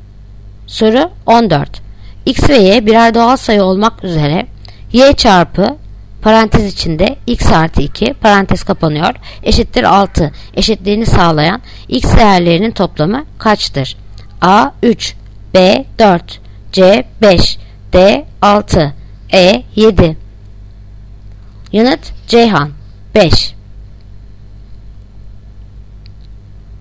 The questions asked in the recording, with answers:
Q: X ve Y birer doğal sayı olmak üzere Y çarpı parantez içinde X artı 2 parantez kapanıyor eşittir 6 eşitliğini sağlayan X değerlerinin toplamı kaçtır?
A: Yanıt Ceyhan 5.